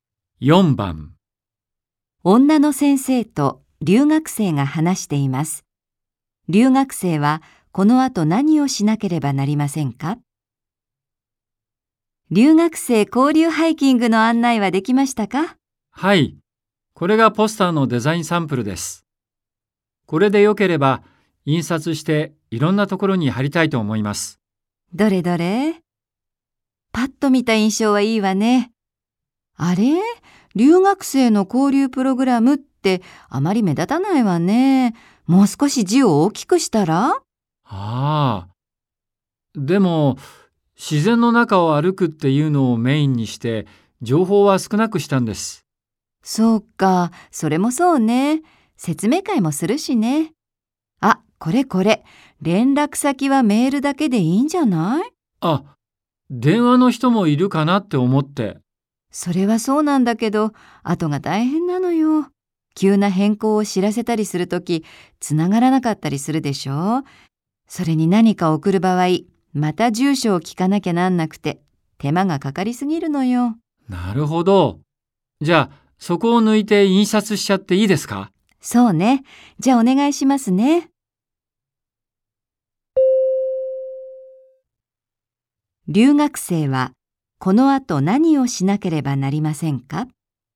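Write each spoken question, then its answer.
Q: 留学生はこの後何をしなければなりませんか?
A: ポスターから電話の連絡先を消して印刷する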